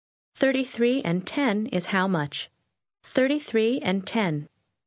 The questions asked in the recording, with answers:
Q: 33 and 10 is how much? 33 and 10.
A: 43.